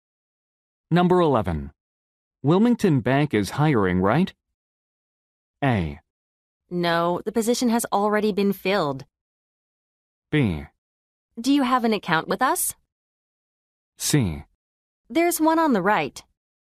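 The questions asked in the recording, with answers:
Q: Wilmington Bank is hiring, right?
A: A: No, the position has already been filled.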